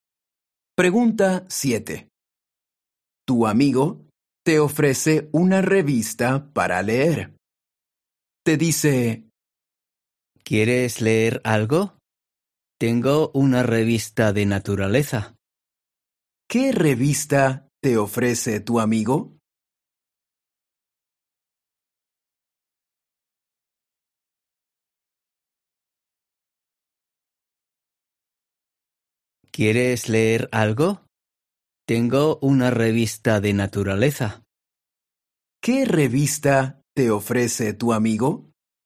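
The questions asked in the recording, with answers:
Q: ¿Qué revista te ofrece tu amigo?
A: Una revista de naturaleza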